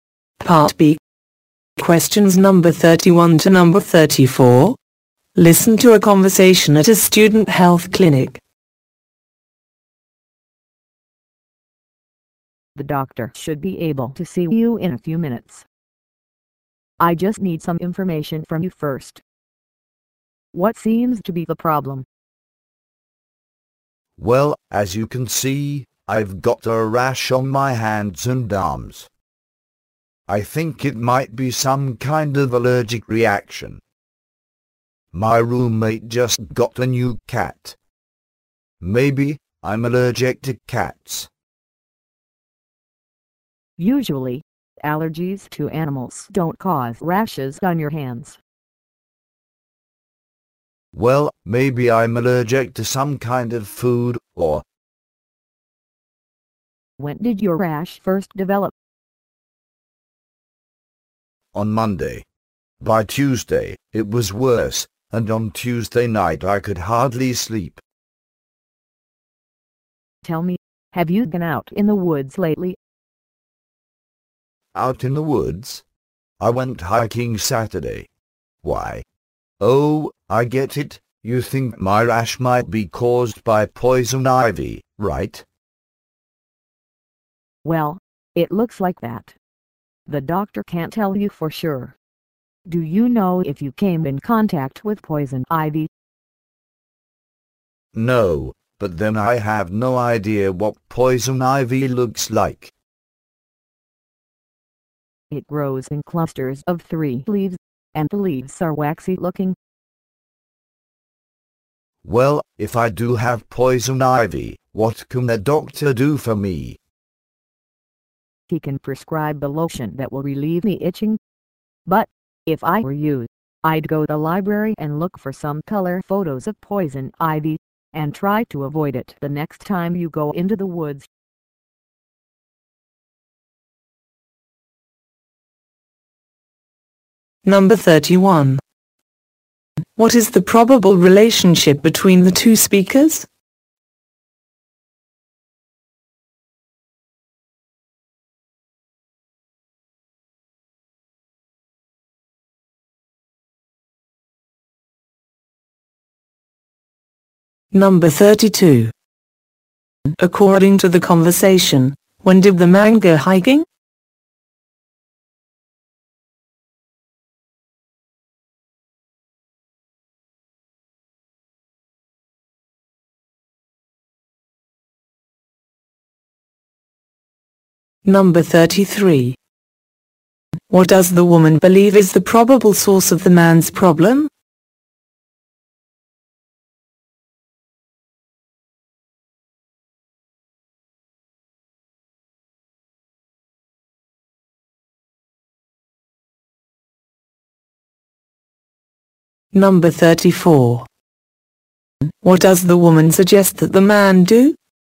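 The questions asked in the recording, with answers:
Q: According to the conversation, when did the man go hiking?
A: On Saturday.

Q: What does the woman believe is the probable source of the man's problem?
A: Poison ivy.

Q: What does the woman suggest that the man do?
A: Look at color photos of poison ivy in the library and avoid it.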